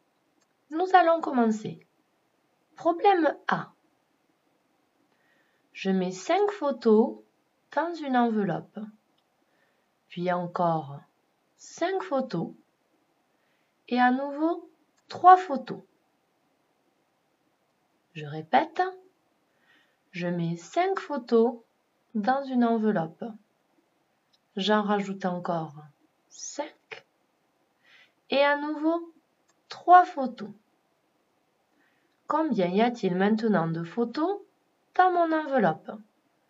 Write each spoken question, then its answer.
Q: Combien y a-t-il maintenant de photos dans mon enveloppe?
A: Tu as dû trouver qu'au problème A, il y avait maintenant 13 photos dans l'enveloppe.